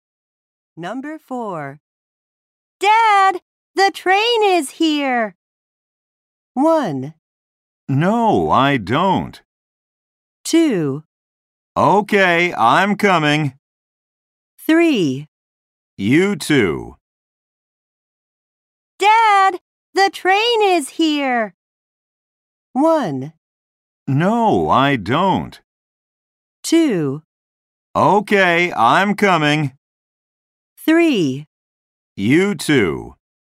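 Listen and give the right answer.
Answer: 2: Okay, I'm coming.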